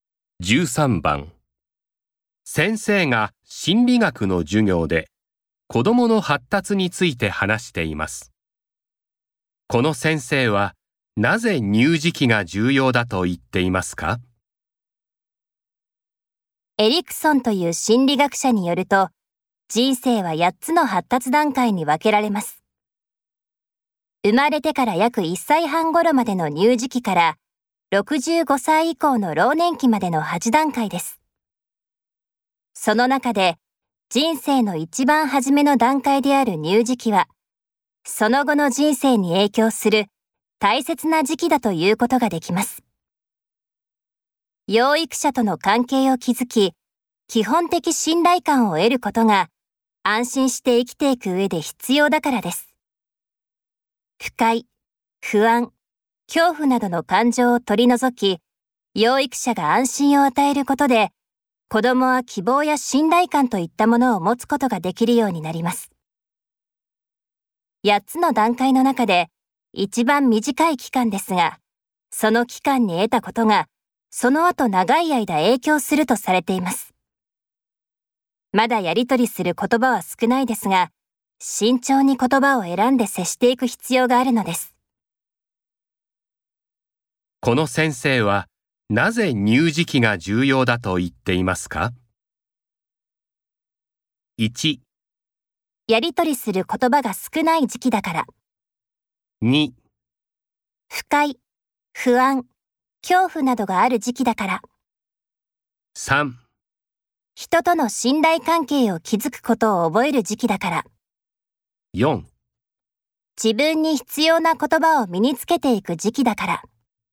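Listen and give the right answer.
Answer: 3: 人との信頼関係を築くことを覚える時期だから。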